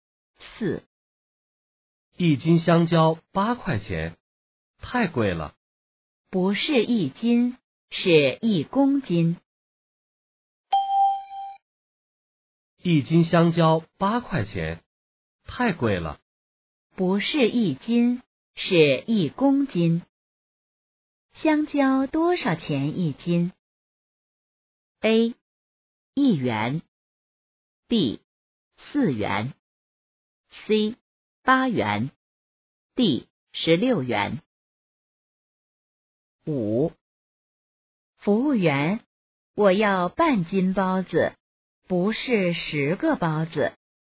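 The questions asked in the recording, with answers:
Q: 香蕉多少钱一斤?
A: B: 四元。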